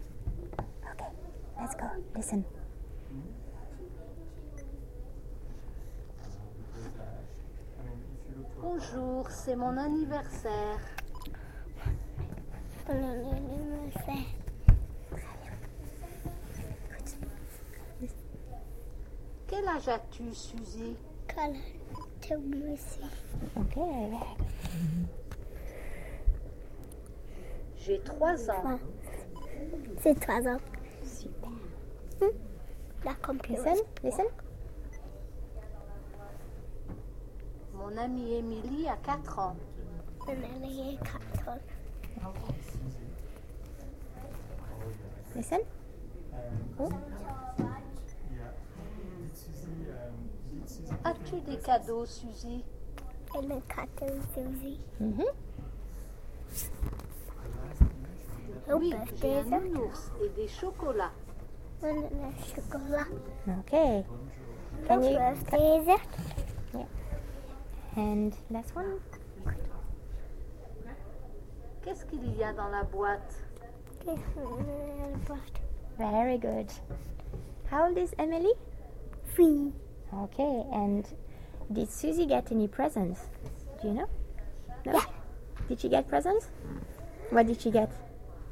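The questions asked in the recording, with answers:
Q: Did she get presents? What did she get?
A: Yes, a teddy bear and chocolates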